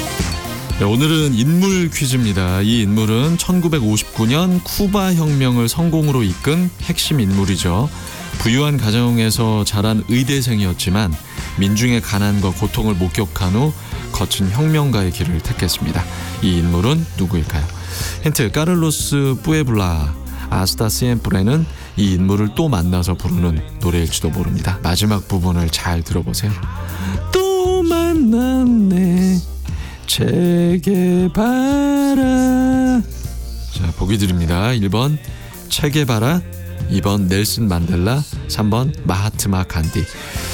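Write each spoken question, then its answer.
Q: 이 인물은 누구일까요?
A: 1번: 체게 바라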